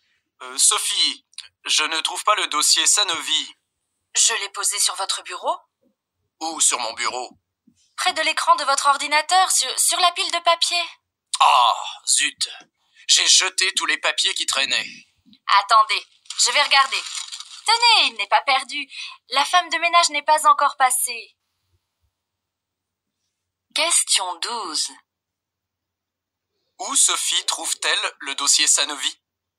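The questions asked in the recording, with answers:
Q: Où Sophie trouve-t-elle le dossier Sanovi ?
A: Dans la corbeille à papier (la poubelle)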